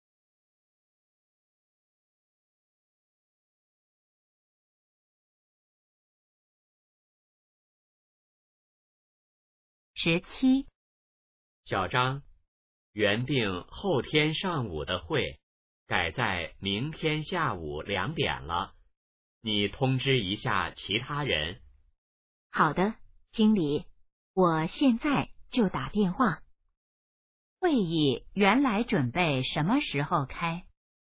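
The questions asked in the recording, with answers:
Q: 会议原来准备什么时候开?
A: 后天上午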